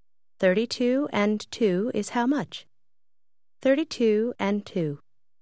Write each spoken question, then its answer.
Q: 32 and 2 is how much?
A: 34.